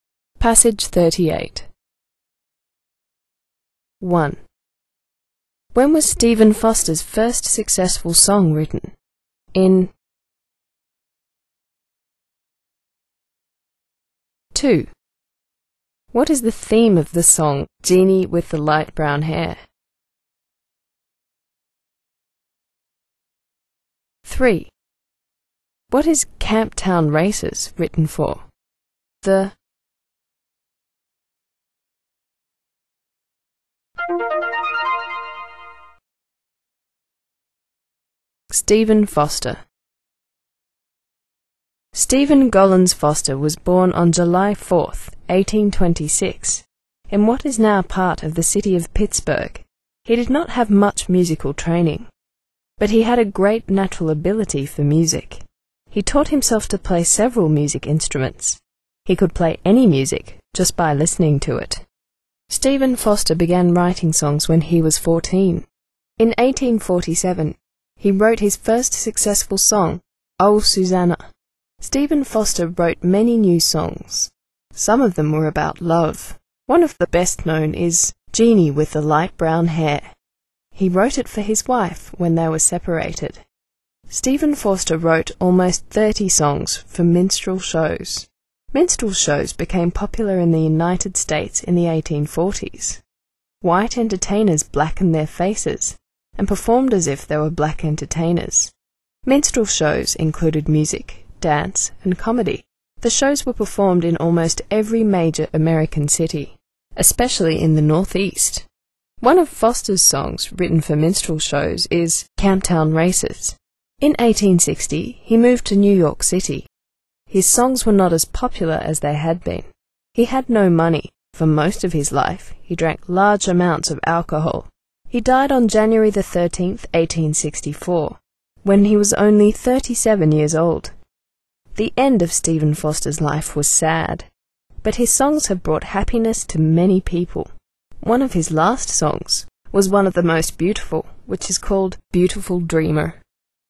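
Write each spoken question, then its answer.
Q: When was Stephen Foster's first successful song written?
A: In 1847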